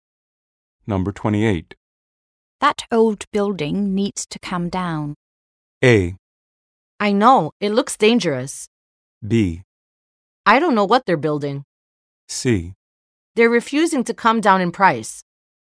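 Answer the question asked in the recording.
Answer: A: I know, it looks dangerous.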